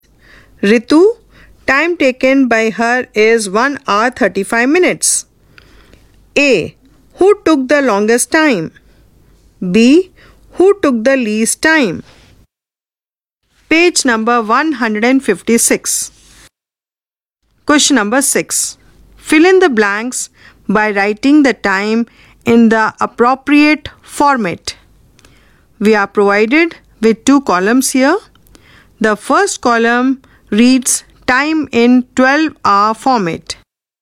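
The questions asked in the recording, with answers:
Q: Who took the longest time?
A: Rani

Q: Who took the least time?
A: Raghav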